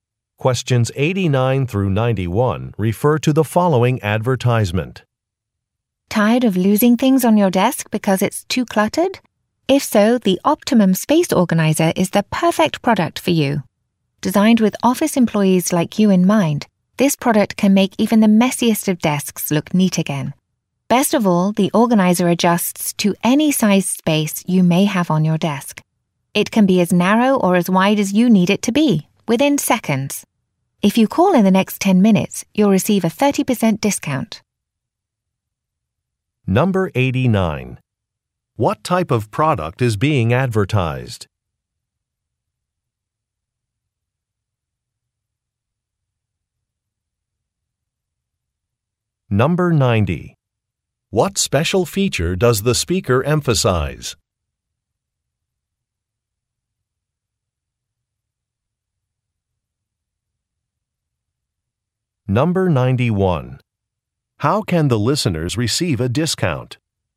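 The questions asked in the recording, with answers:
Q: What type of product is being advertised?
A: A desk organizer

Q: What special feature does the speaker emphasize?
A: It adjusts to any size space

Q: How can the listeners receive a discount?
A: By calling in the next 10 minutes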